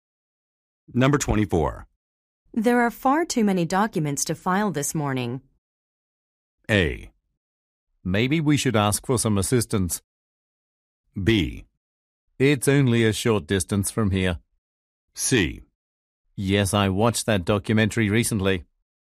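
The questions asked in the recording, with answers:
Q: There are far too many documents to file this morning.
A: A: Maybe we should ask for some assistance.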